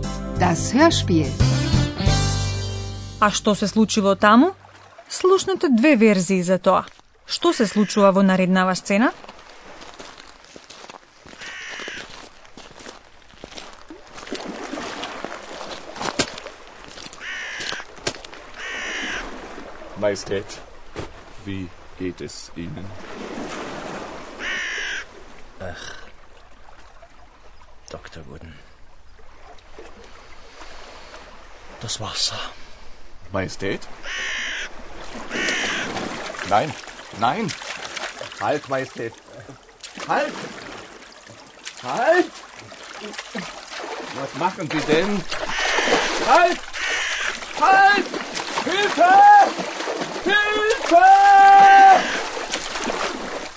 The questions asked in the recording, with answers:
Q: Што се случува во наредната сцена?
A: Но потиштениот крал влегол во водата, а лекарот, обидувајќи се да го спречи, се дави во борба со кралот.